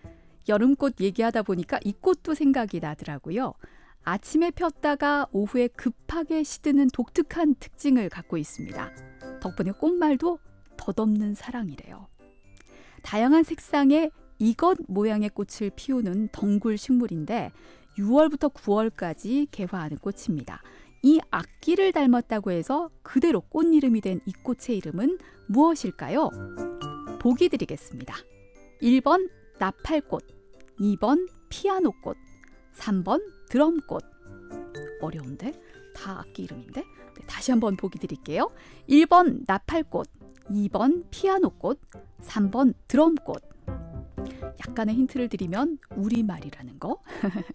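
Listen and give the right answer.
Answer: 1번: 나팔꽃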